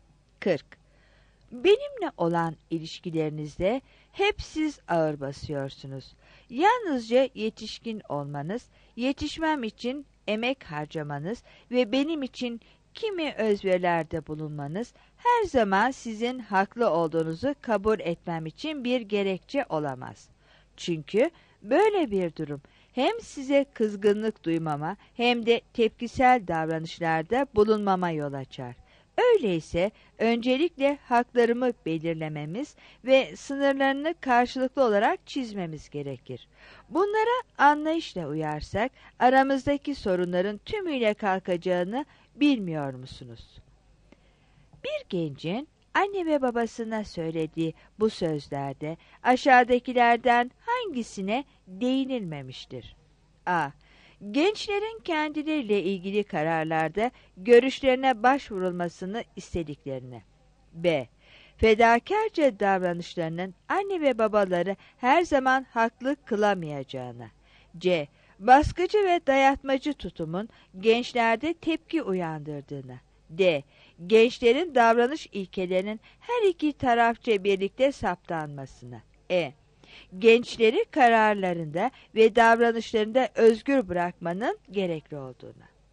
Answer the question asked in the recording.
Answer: 40 E